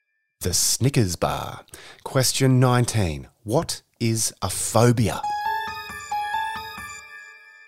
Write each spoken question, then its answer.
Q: What is a phobia?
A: It's when you're scared of something.